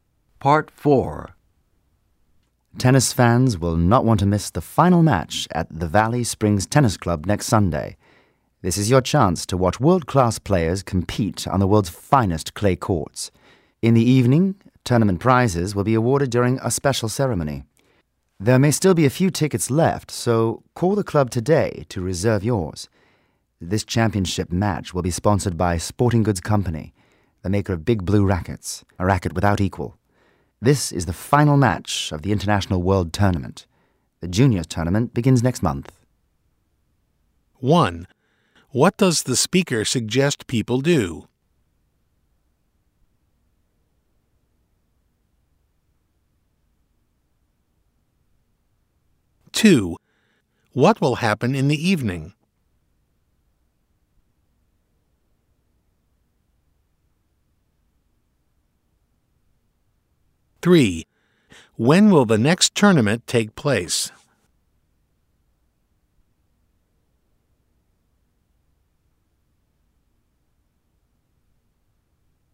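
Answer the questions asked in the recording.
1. Call the club today to reserve tickets
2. Tournament prizes will be awarded at a special ceremony
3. Next month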